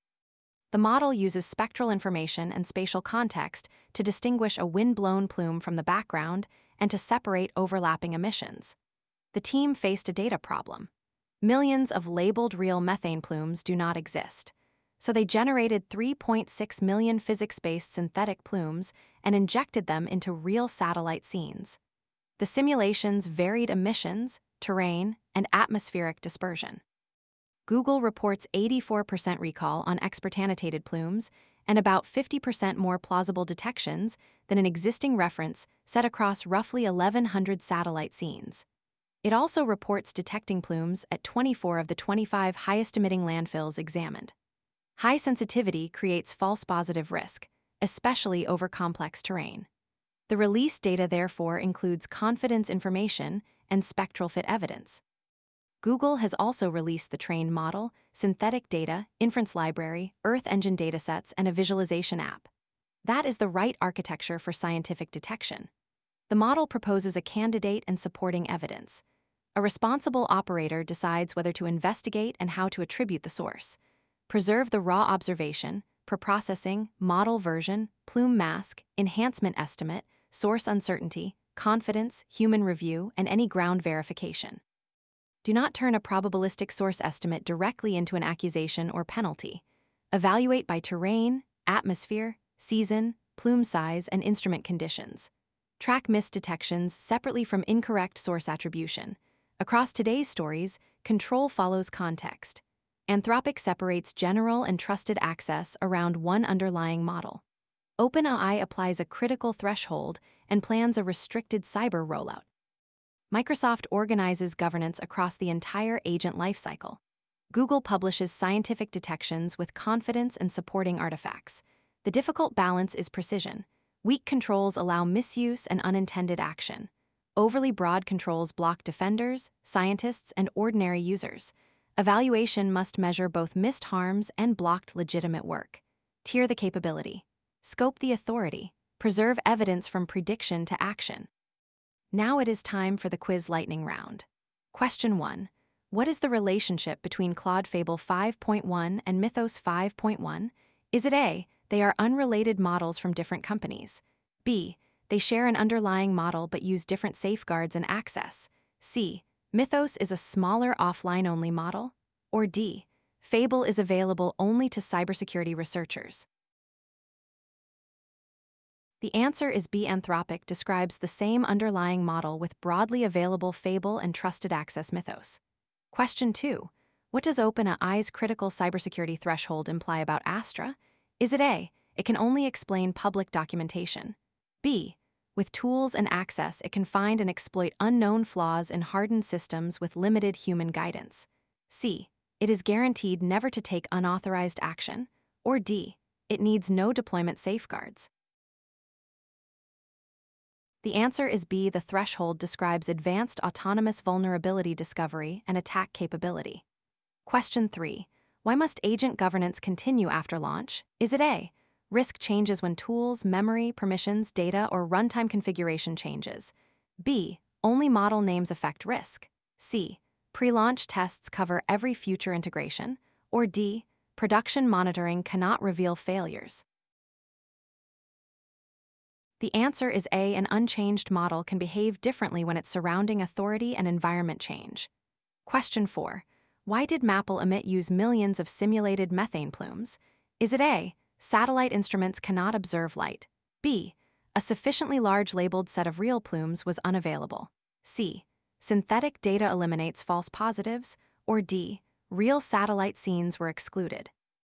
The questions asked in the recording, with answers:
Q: Why did MAPL emit use millions of simulated methane plumes?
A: The answer is B, physics-based simulations supplied varied labels and were injected into real satellite scenes.